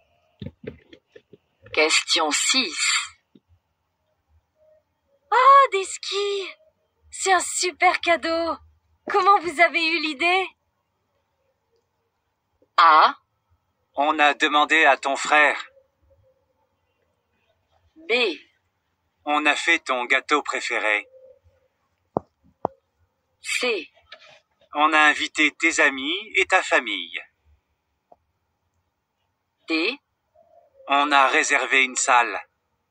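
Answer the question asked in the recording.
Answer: A: On a demandé à ton frère.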